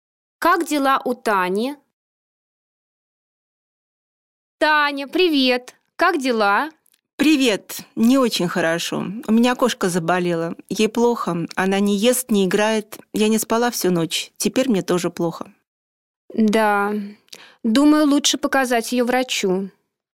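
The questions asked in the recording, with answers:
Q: Как дела у Тани?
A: Не очень хорошо: кошка заболела, она не спала всю ночь, ей плохо.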